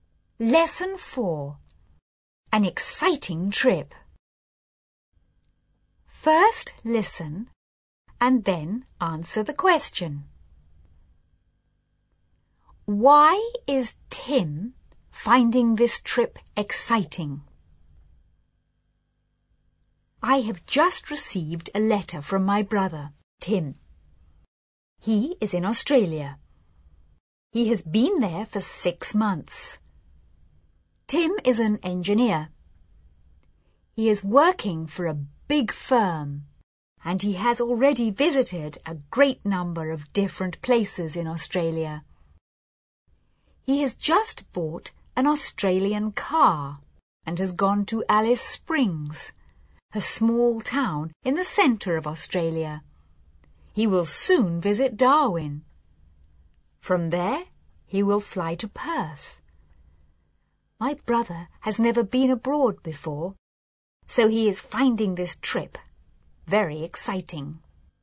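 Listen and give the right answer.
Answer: Because he has never been abroad before.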